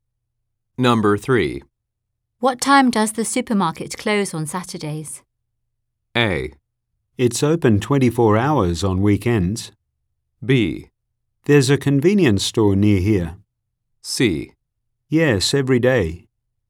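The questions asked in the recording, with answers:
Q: What time does the supermarket close on Saturdays?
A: A: It's open 24 hours on weekends.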